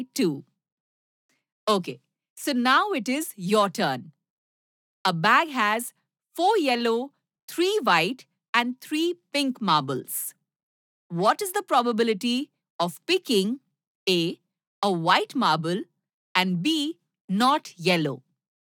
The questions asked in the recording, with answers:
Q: What is the probability of picking A, a white marble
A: White marbles probability will be 3 by 10.